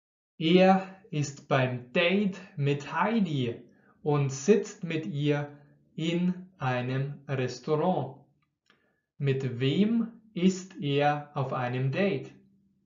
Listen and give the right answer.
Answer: Mit Heidi. Er ist mit der hübschen Heidi auf einem Date.